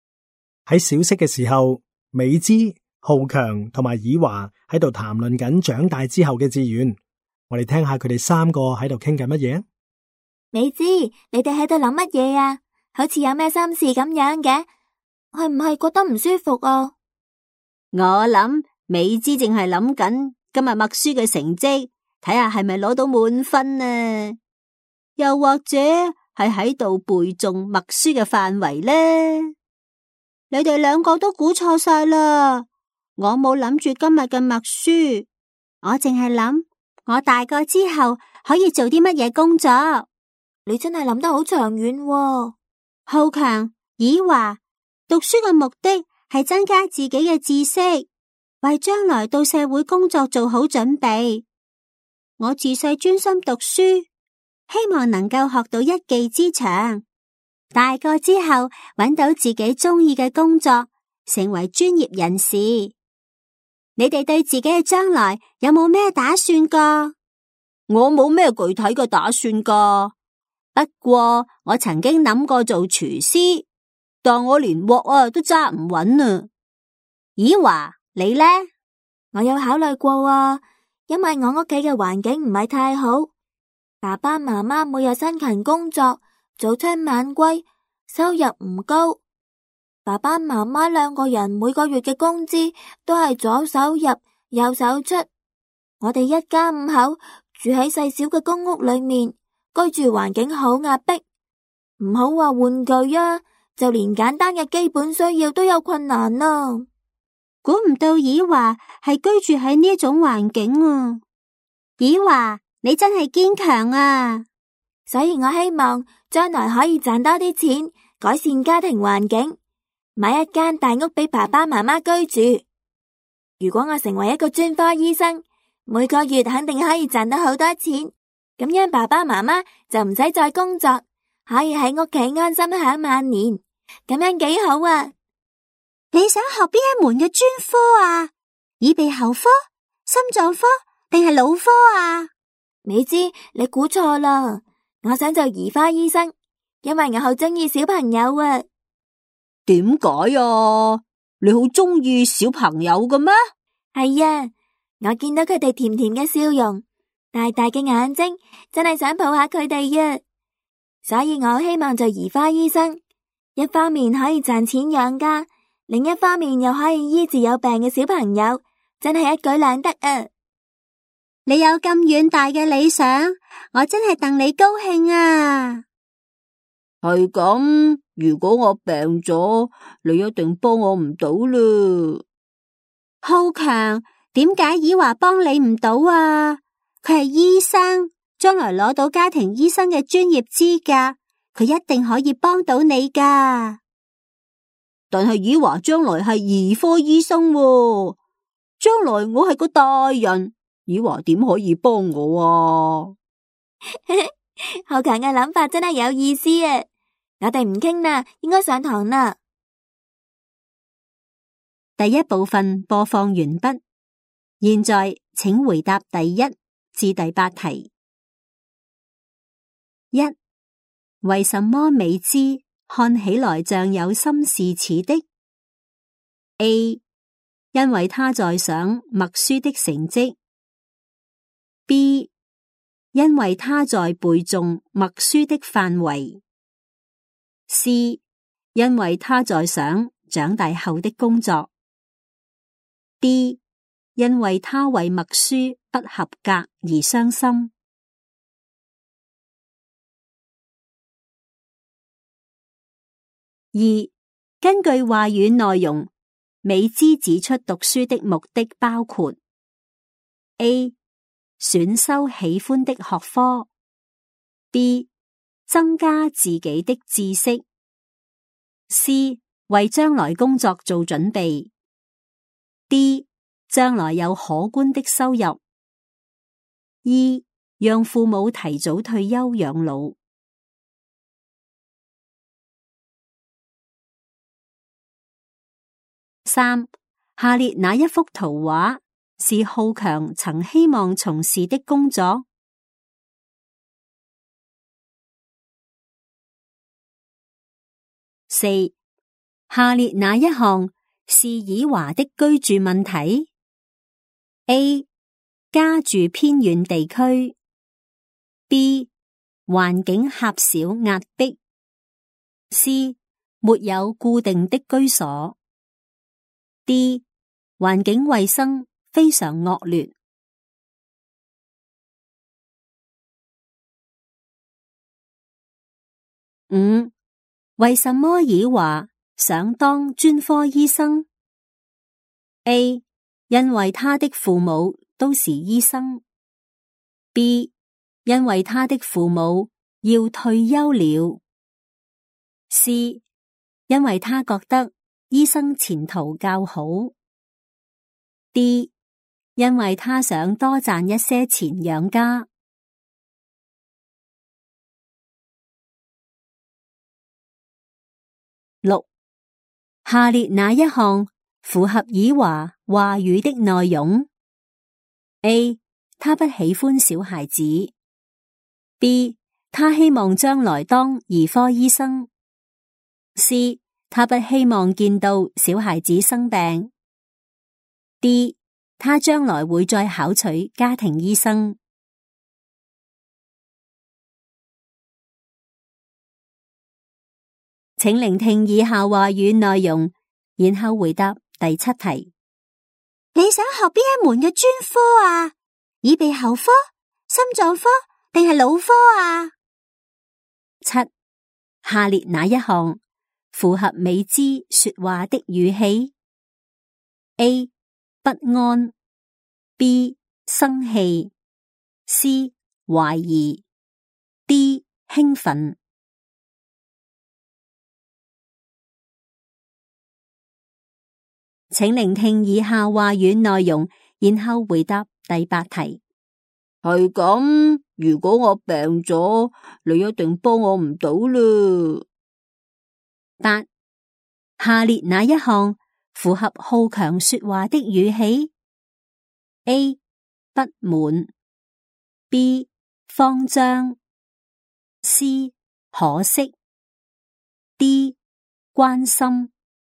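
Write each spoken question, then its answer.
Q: 为什么美姿看起来像有心事似的 ?A, 因为他在想默书的成绩。 B, 因为他在背诵默书的范围。C, 因为他在想长大后的工作。 D, 因为他为默书不合格而伤心。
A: C: 因为他在想长大后的工作

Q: 根据话语内容,美姿指出读书的目的包括 A. 选修喜欢的学科 B. 增加自己的知识 C. 为将来工作做准备 D. 将来有可观的收入 E. 让父母提早退休养老。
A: B: 增加自己的知识;C: 为将来工作做准备

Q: 下列哪一项是以华的居住问题 ?A. 家住偏远地区 ,B. 环境狭小压迫 ,C. 没有固定的居所。D. 环境卫生非常恶劣。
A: B: 环境狭小压迫

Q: 为什么以华想当专科医生 ?A. 因为他的父母都是医生。 B. 因为他的父母要退休了。C. 因为他觉得医生前途较好。 D. 因为他想多赚一些钱养家。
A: D: 因为他想多赚一些钱养家

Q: 下列哪一项符合以华话语的内容 ?A. 他不喜欢小孩子。 B. 他希望将来当儿科医生。C.他不希望见到小孩子生病。 D. 他将来会再考取家庭医生。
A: B: 他希望将来当儿科医生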